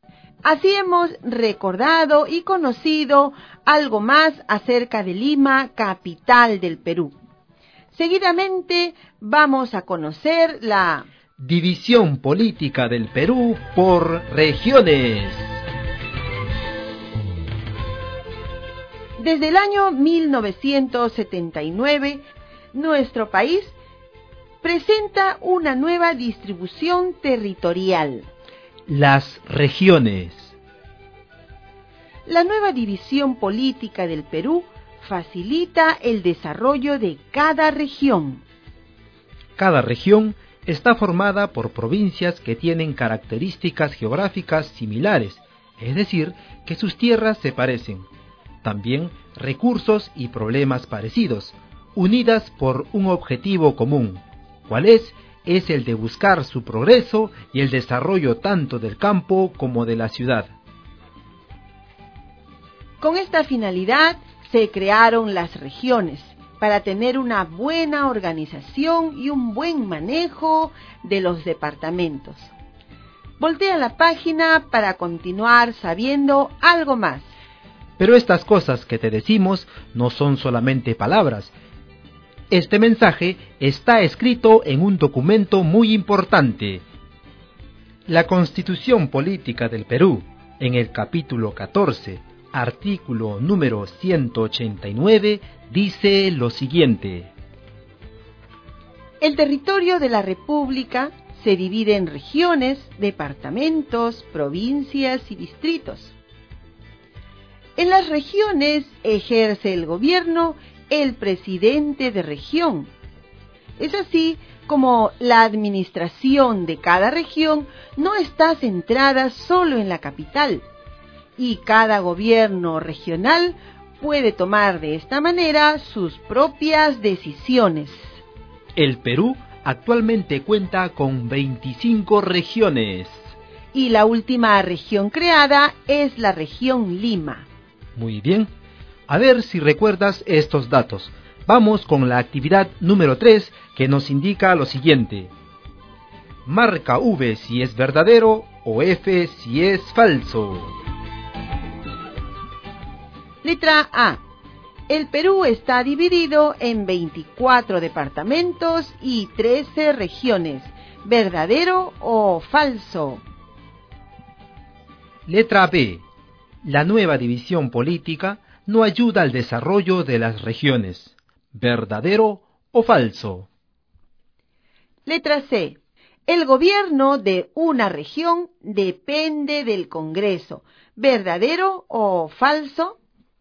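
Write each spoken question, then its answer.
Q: El Perú está dividido en 24 departamentos y 13 regiones. ¿Verdadero o falso?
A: Falso

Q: La nueva división política no ayuda al desarrollo de las regiones. ¿Verdadero o falso?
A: Falso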